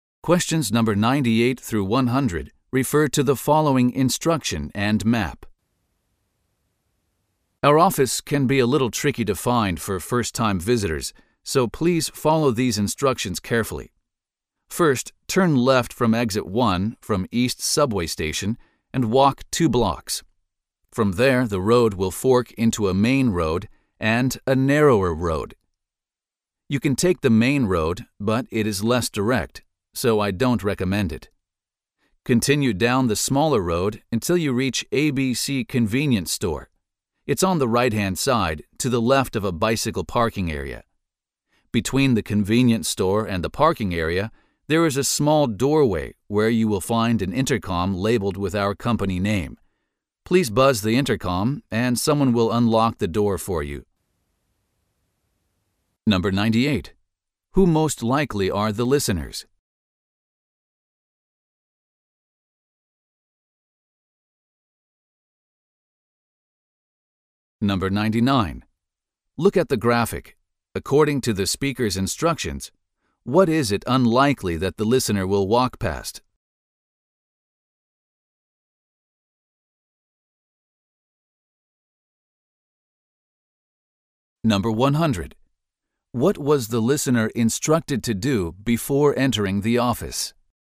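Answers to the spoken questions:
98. First-time visitors to the office
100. Buzz the intercom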